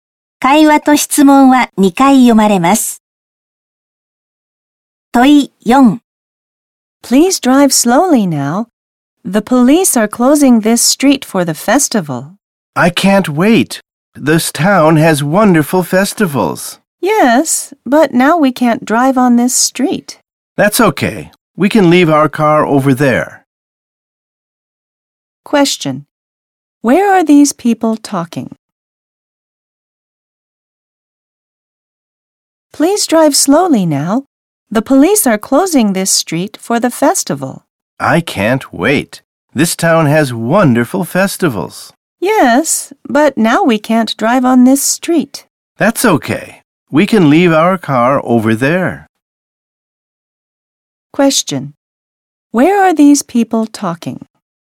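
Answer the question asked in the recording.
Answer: In a car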